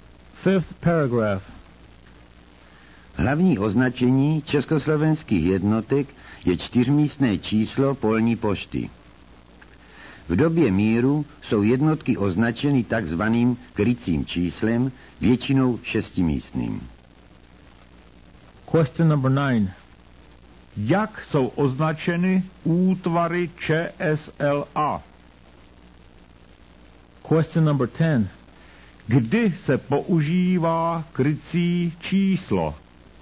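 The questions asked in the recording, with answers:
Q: Kdy se používá krycí číslo?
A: v době míru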